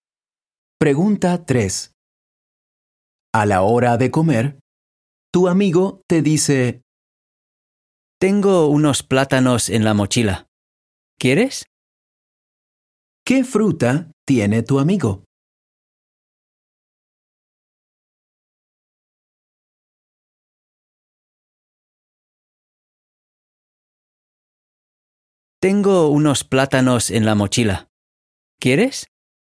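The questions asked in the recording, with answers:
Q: ¿Qué fruta tiene tu amigo?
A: Plátanos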